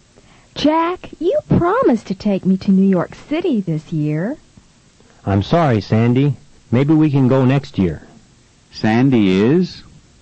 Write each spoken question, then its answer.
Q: Sandy is?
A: Sandy is sad.